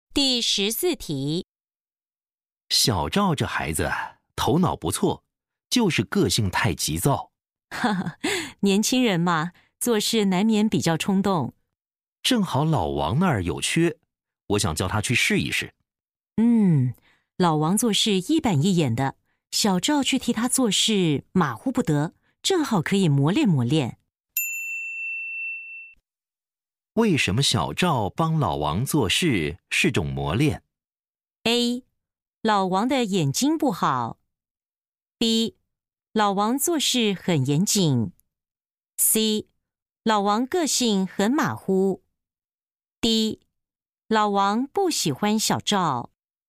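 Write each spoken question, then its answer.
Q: 为什么小赵帮老王做事是种磨练?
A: B: 老王做事很严谨。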